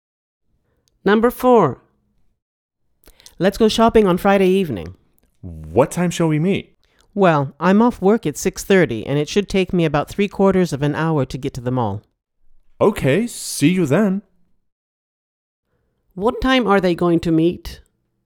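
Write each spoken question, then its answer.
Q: What time are they going to meet?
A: 7:15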